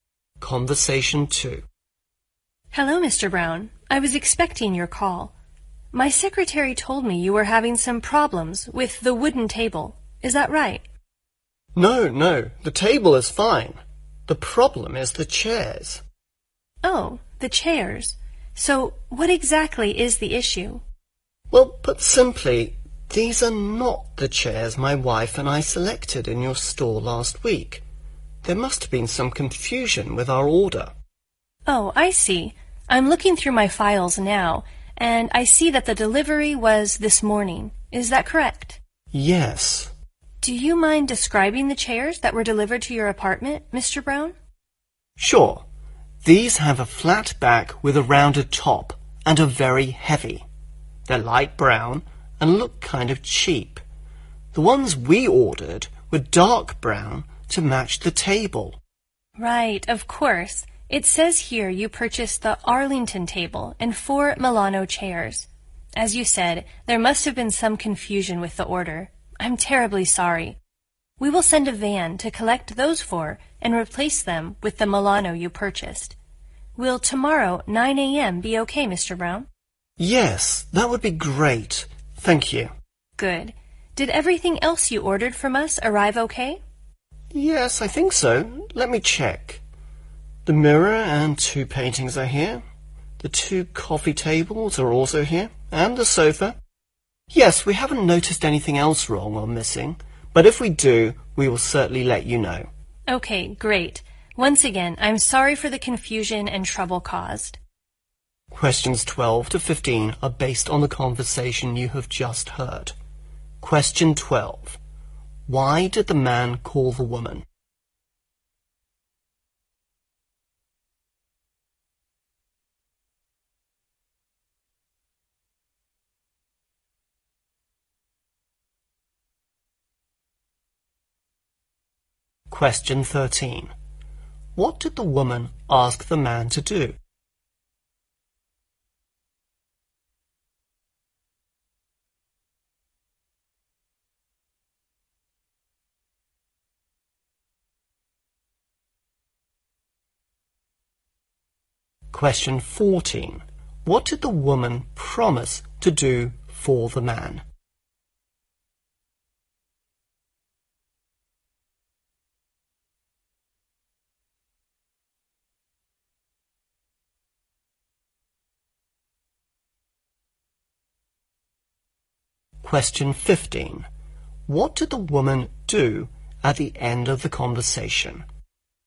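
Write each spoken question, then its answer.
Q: Why did the man call the woman?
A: The wrong chairs were delivered

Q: What did the woman ask the man to do?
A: Describe the chairs that were delivered

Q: What did the woman promise to do for the man?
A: Collect the chairs and replace them with the Milano chairs

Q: What did the woman do at the end of the conversation?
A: She apologized for the confusion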